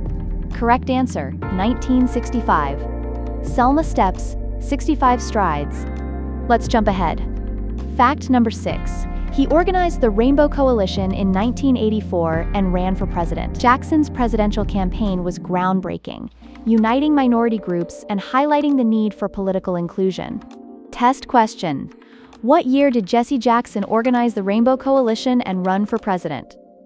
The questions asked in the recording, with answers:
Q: What year did Jesse Jackson organize the Rainbow Coalition and run for president?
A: Correct answer, 1984.